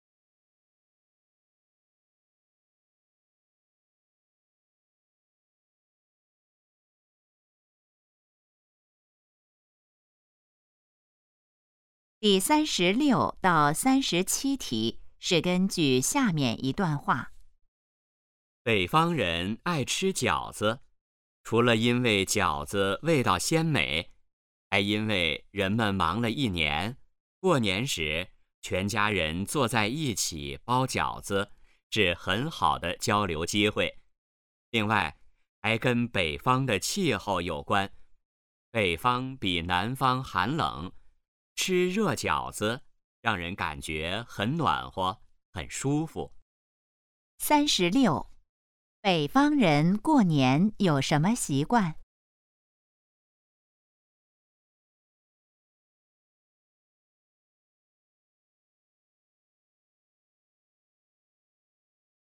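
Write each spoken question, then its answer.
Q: 北方人过年有什么习惯?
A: 全家一起包饺子、吃饺子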